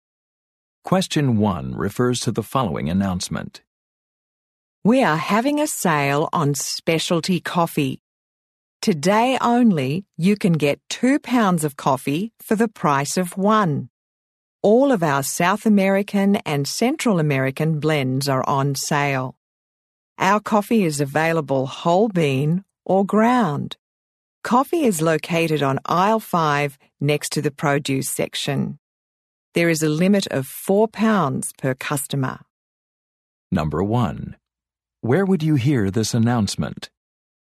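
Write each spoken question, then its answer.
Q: Where would you hear this announcement?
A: In a grocery store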